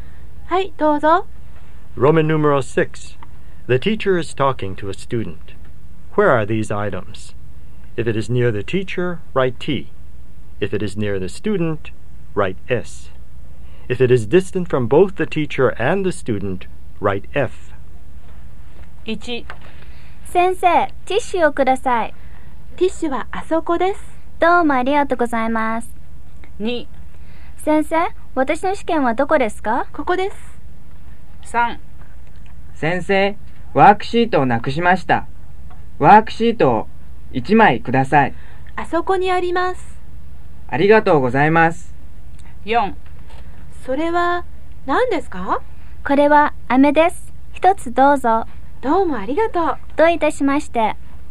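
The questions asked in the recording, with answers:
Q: Where are these items? If it is near the teacher, write T.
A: F (tissues, over there)

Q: Where are these items? If it is near the teacher, write T.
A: T (exam)

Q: Where are these items? If it is near the teacher, write T.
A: F (worksheet)

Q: Where are these items? If it is near the teacher, write T.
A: T (candy)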